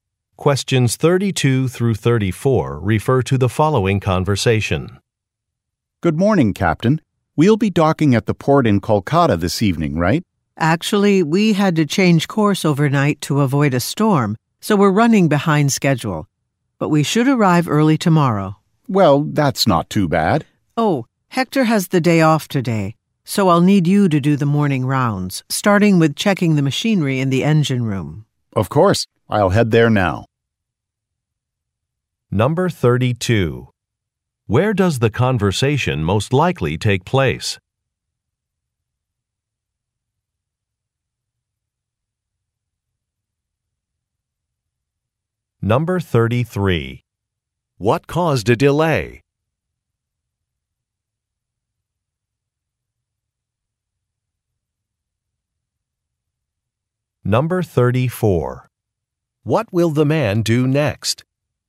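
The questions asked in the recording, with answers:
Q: Where does the conversation most likely take place?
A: On a ship

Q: What caused a delay?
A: A storm

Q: What will the man do next?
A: Check the machinery in the engine room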